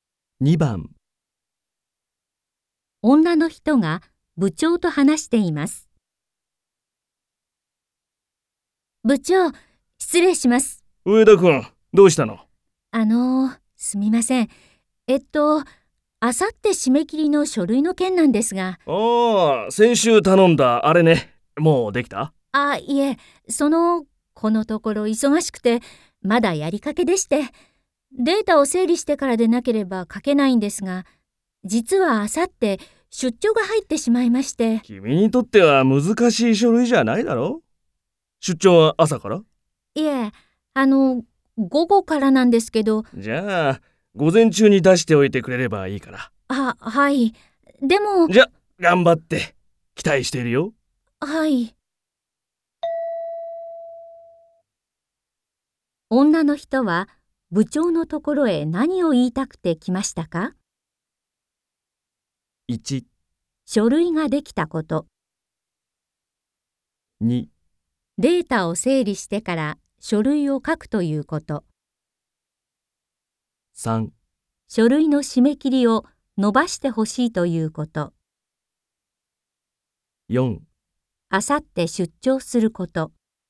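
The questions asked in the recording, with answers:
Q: 女の人は部長のところへ何を言いたくて来ましたか?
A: 3: 書類の締め切りを伸ばしてほしいということ。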